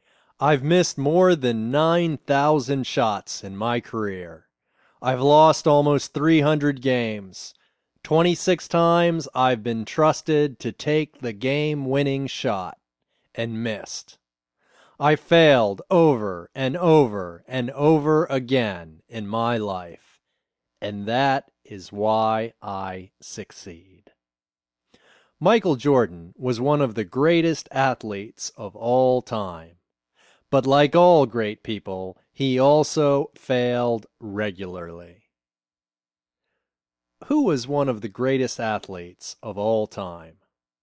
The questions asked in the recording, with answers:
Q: Who was one of the greatest athletes of all time?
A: Michael Jordan was one of the greatest athletes of all time.